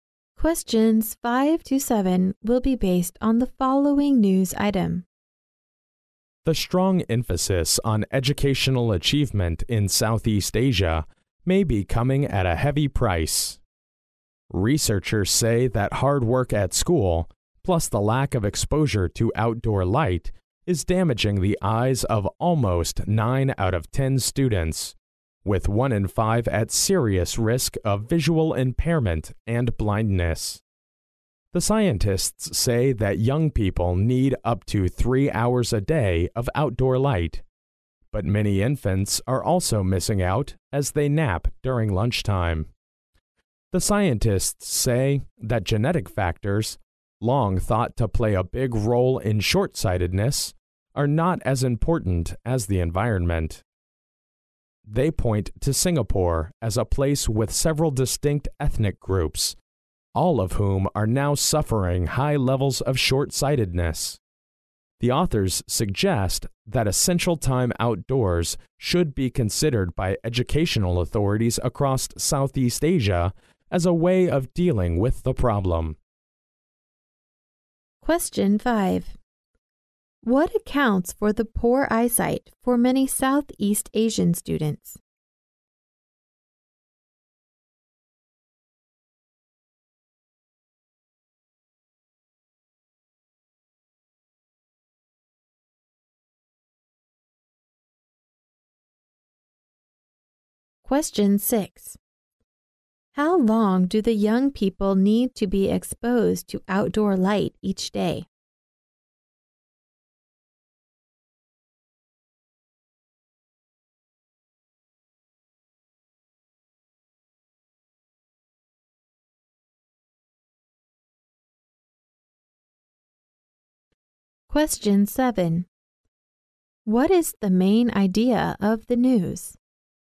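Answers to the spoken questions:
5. Hard work at school plus lack of exposure to outdoor light
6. Up to 3 hours
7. Too much study and too little outdoor light are damaging Southeast Asian students' eyesight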